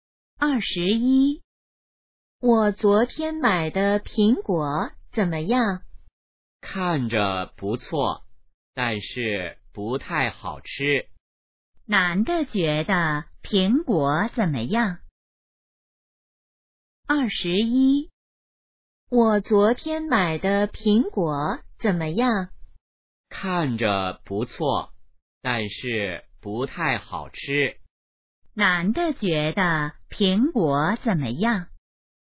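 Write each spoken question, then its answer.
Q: 男的觉得苹果怎么样?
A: 不太好吃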